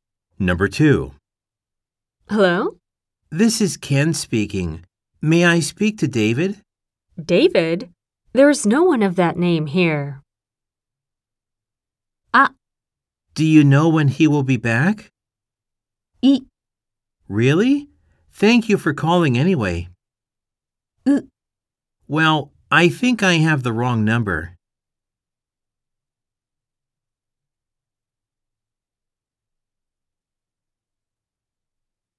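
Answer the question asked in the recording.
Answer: C: Well, I think I have the wrong number.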